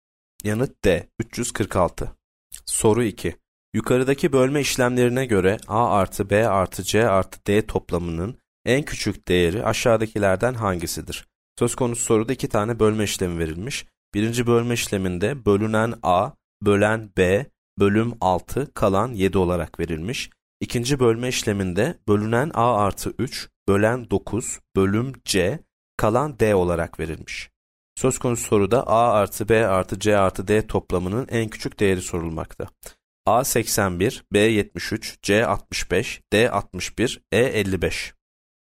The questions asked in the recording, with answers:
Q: Yukarıdaki bölme işlemlerine göre A artı B artı C artı D toplamının en küçük değeri aşağıdakilerden hangisidir?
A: Yanıt B 73.